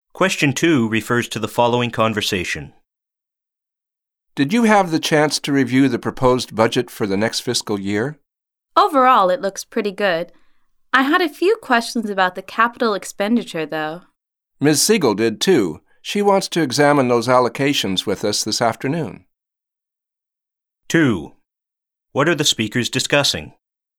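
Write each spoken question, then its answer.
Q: What are the speakers discussing?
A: The proposed budget for the next fiscal year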